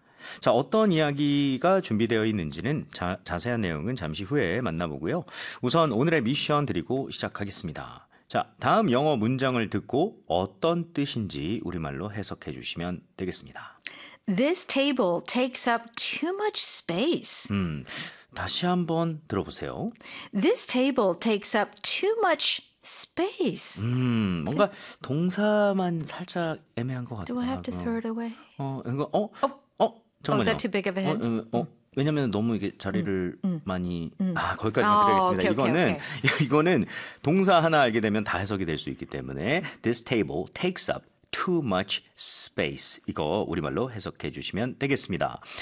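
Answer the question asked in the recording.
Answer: 이 테이블은 공간을 너무 많이 차지한다.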